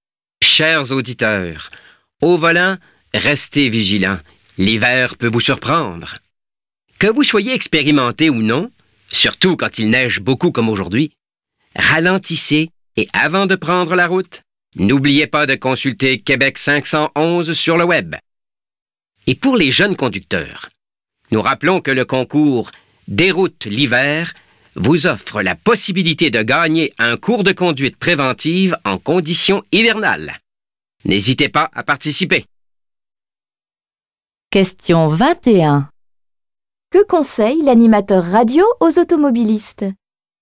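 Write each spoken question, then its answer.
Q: Que conseille l'animateur radio aux automobilistes?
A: De ralentir et de consulter Québec 511 sur le web avant de prendre la route.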